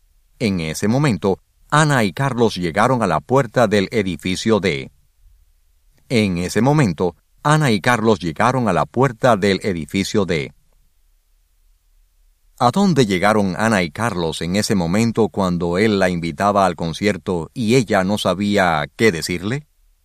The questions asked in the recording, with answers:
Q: ¿A dónde llegaron Ana y Carlos en ese momento cuando él la invitaba al concierto y ella no sabía qué decirle?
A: En ese momento, Ana y Carlos llegaron a la puerta del edificio D.